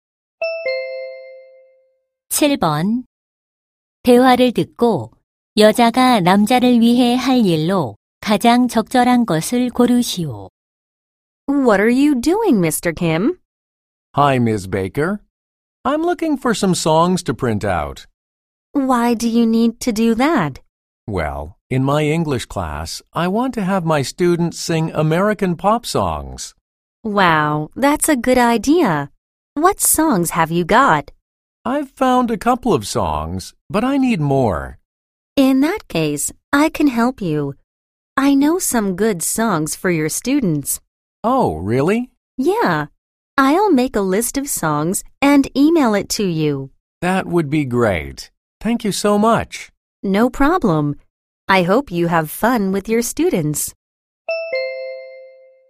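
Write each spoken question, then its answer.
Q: 대화를 듣고 여자가 남자를 위해 할 일로 가장 적절한 것을 고르시오.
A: 노래 목록을 만들어 이메일로 보내기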